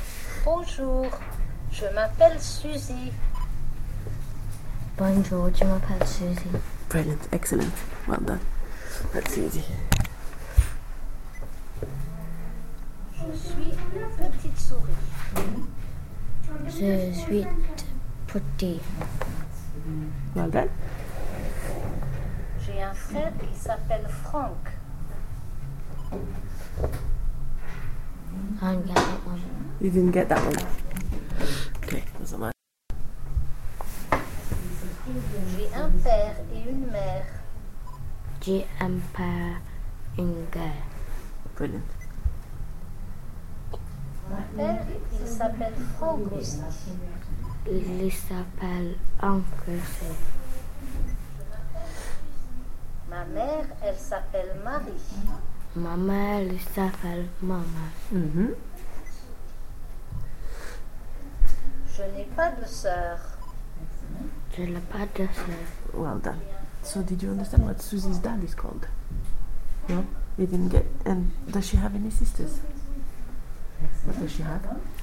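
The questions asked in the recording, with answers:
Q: So did you understand what Susie's dad is called?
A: Franck

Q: And does she have any sisters?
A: No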